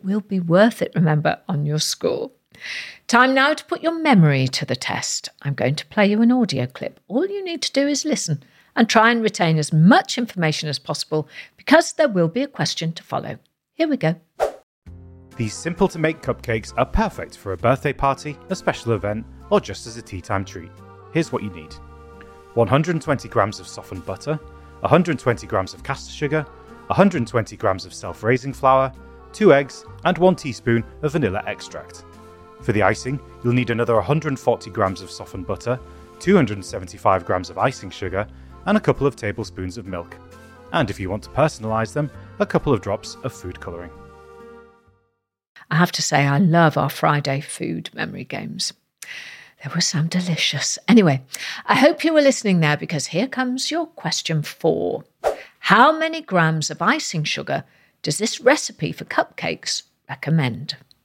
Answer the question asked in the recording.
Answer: Well, the answer was 275 grams of icing sugar.